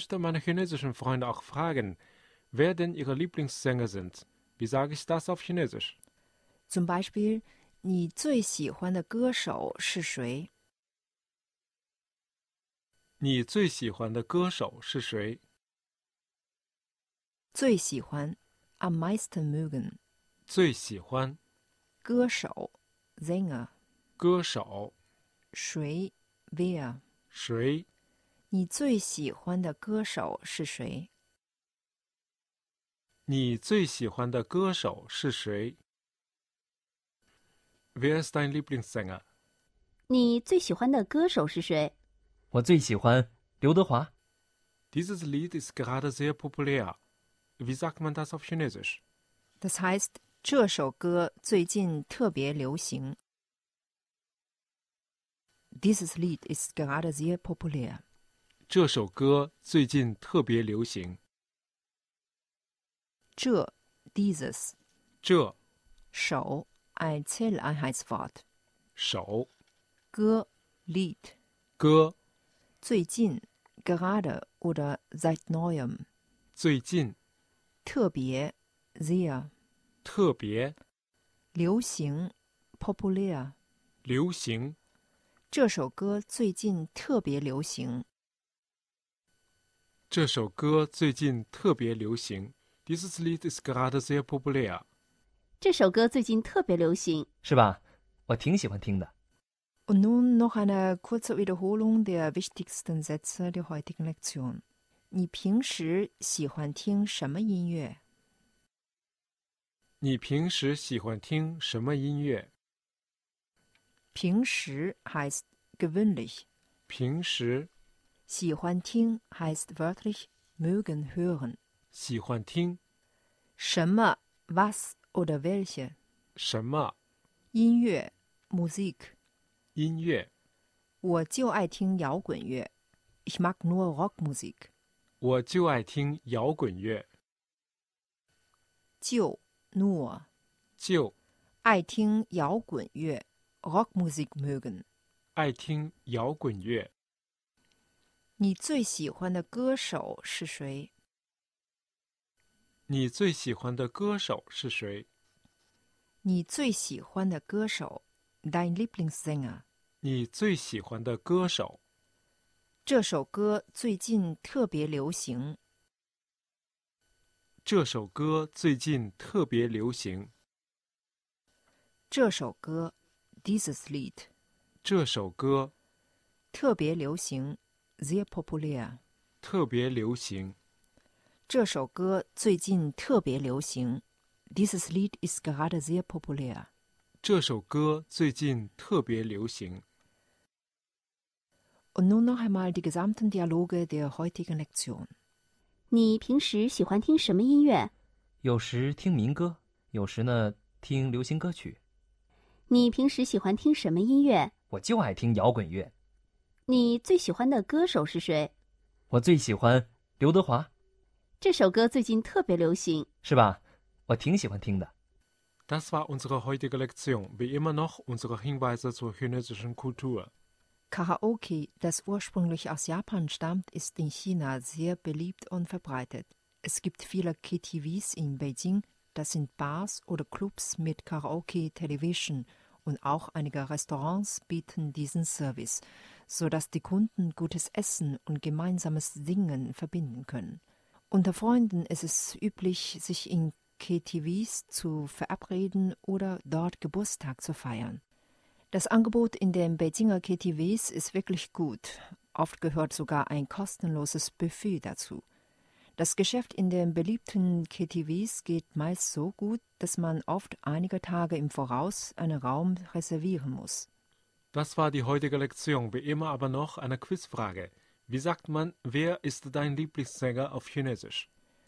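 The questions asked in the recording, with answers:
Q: Wie sagt man, wer ist dein Lieblingssänger auf Chinesisch?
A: 你最喜欢的歌手是谁?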